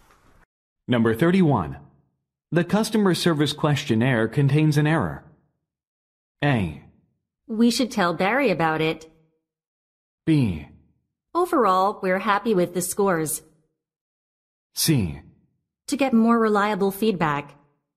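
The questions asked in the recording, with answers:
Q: The customer service questionnaire contains an error.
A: A: We should tell Barry about it.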